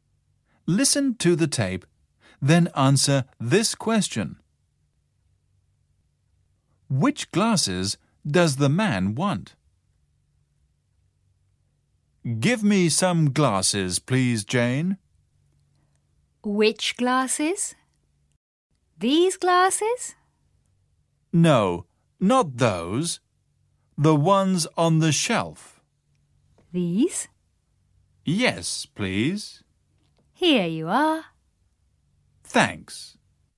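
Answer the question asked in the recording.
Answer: The ones on the shelf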